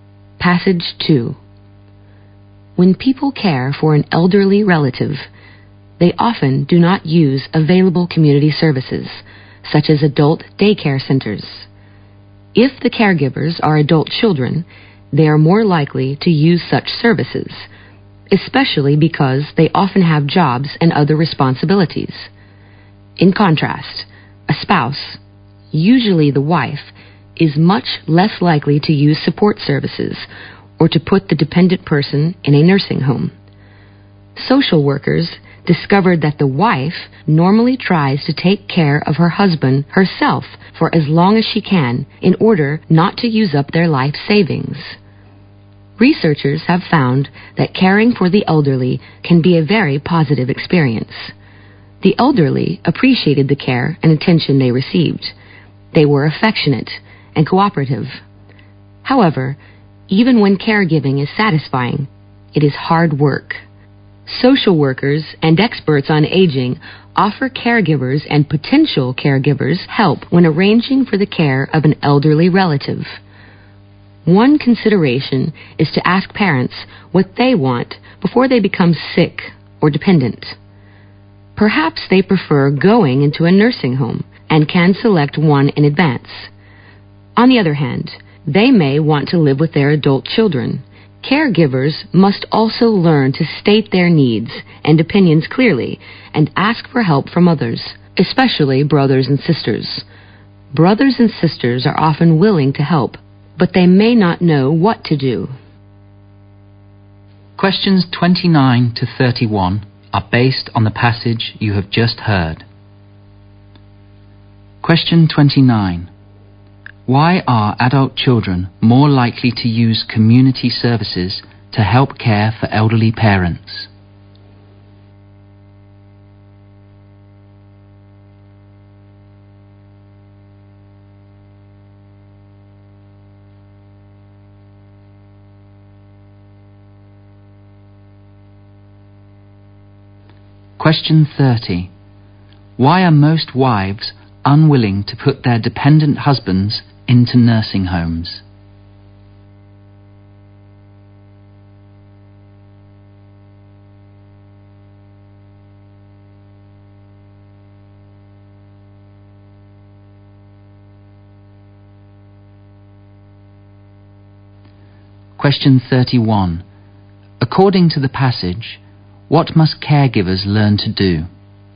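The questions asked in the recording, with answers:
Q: Why are adult children more likely to use community services to help care for elderly parents?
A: They have jobs and other responsibilities.

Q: Why are most wives unwilling to put their dependent husbands into nursing homes?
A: They don't want to use up their life savings.

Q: According to the passage, what must caregivers learn to do?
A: To state their needs and opinions clearly and ask others, especially siblings, for help.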